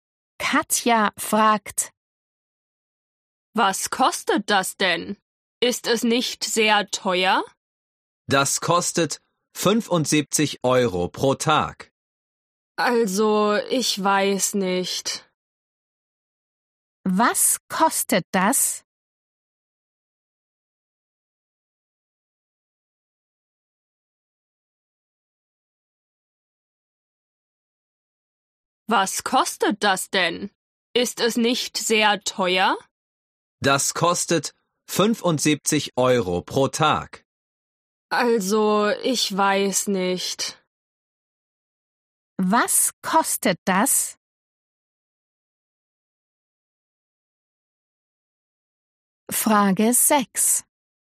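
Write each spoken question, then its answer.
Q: Was kostet das?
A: 75 Euro pro Tag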